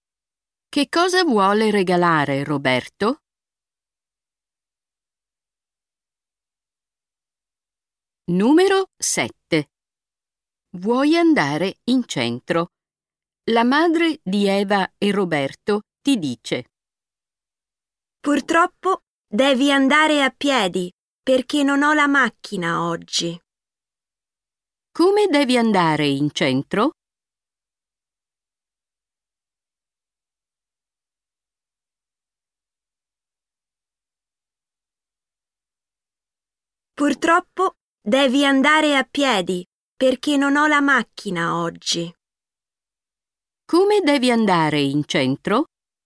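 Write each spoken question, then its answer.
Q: Come devi andare in centro?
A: A piedi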